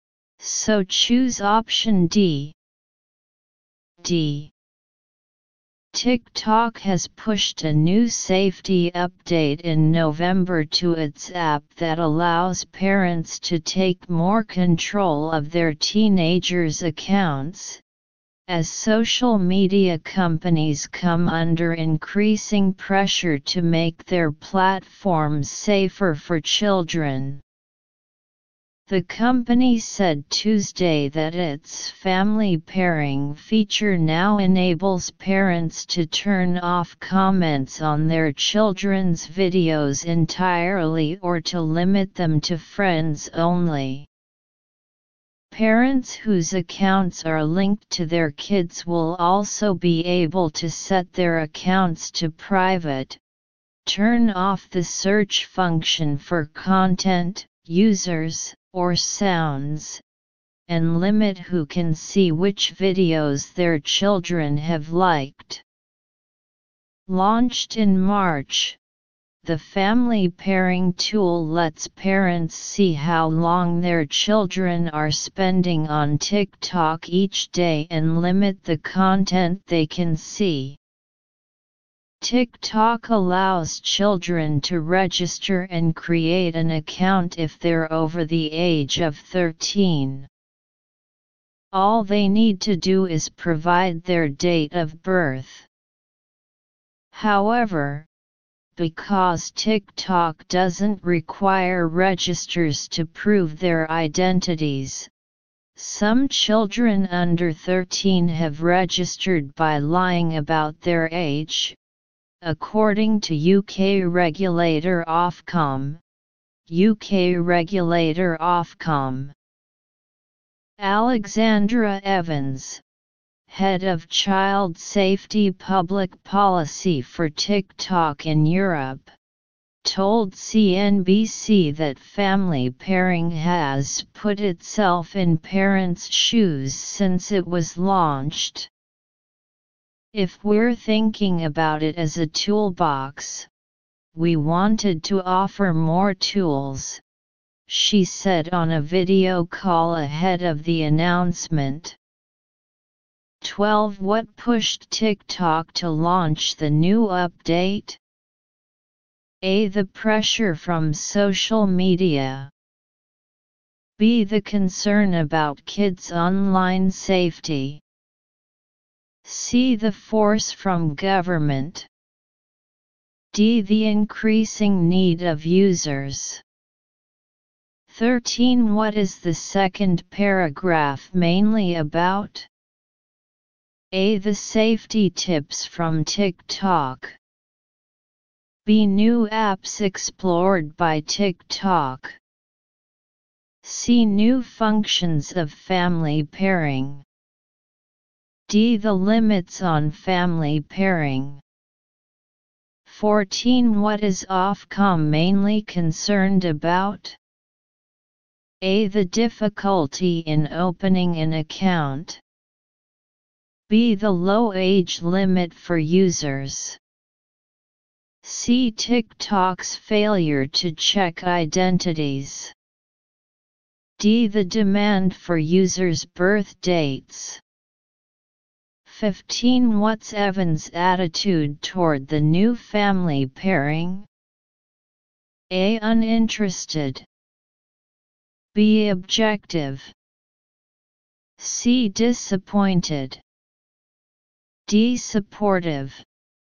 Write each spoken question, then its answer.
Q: What pushed TikTok to launch the new update?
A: 12. B.

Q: What is the second paragraph mainly about?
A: 13. C.

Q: What's Evan's attitude toward the new family pairing?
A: 15. D.